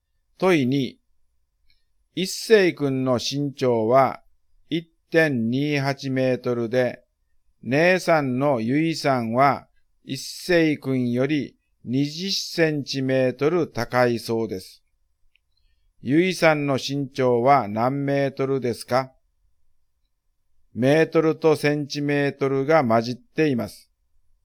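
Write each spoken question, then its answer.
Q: ゆいさんの身長は何メートルですか?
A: 1.48メートル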